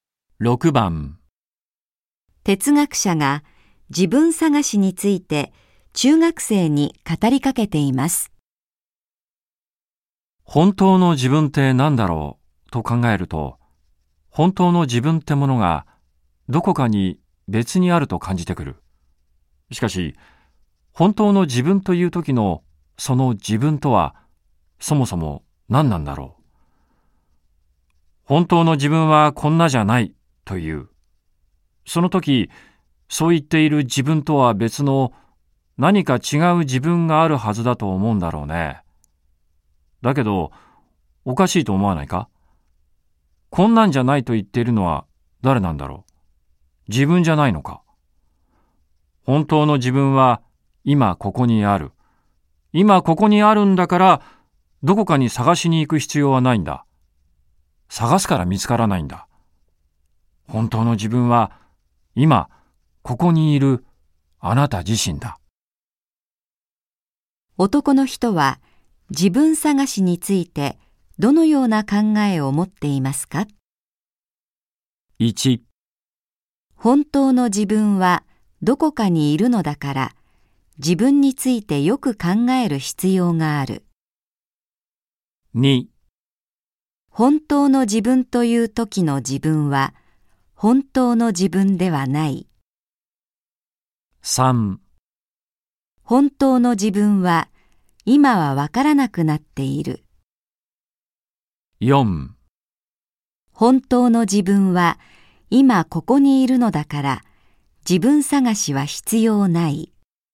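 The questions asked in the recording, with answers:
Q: 男の人は自分探しについてどのような考えを持っていますか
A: 4: 本当の自分は今ここにいるのだから自分探しは必要ない。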